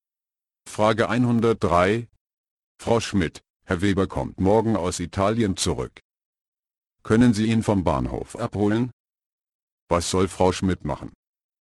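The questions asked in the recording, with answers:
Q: Was soll Frau Schmidt machen?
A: Herrn Weber vom Bahnhof abholen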